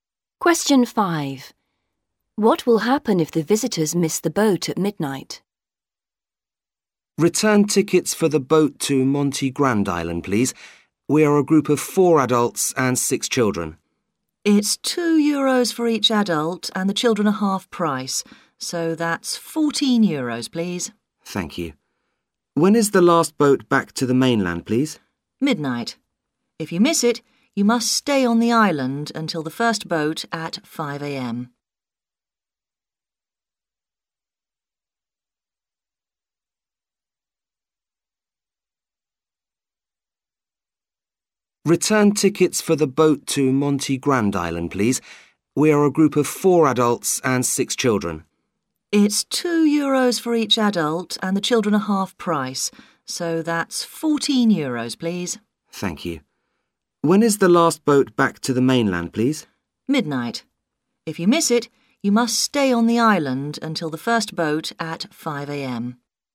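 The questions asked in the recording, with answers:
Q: What will happen if the visitors miss the boat at midnight?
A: They must stay on the island until the first boat at 5 a.m.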